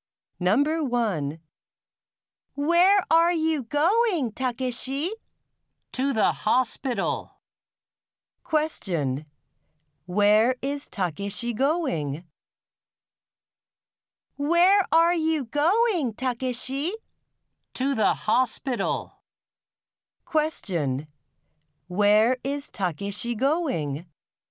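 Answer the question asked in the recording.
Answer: To the hospital.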